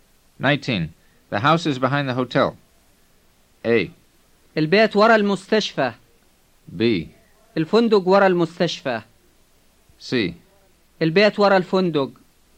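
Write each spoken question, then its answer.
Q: The house is behind the hotel.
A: C: البيت ورا الفندق.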